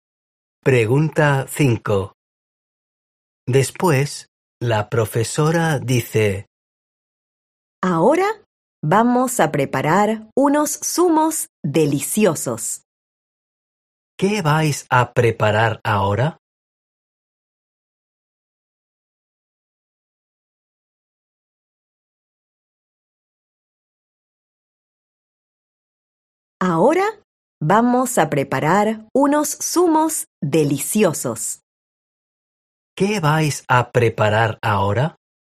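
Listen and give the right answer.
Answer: Unos zumos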